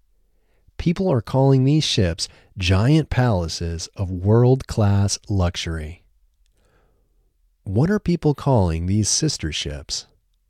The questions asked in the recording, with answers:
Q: What are people calling these sister ships?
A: People are calling these sister ships giant palaces of world-class luxury.